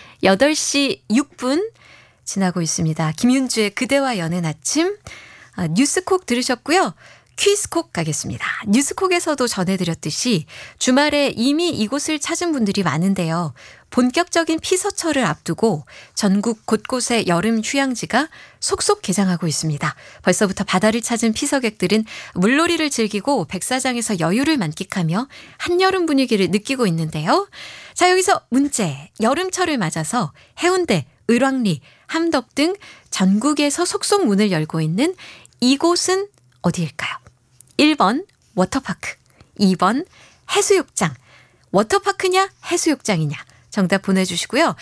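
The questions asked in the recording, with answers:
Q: 여름철을 맞아서 해운대, 을왕리, 함덕 등 전국에서 속속 문을 열고 있는 이곳은 어디일까요?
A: 2: 해수욕장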